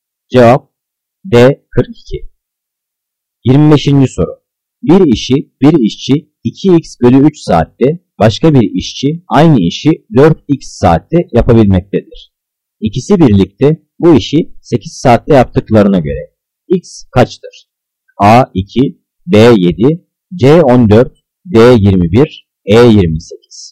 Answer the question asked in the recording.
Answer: Cevap C 14.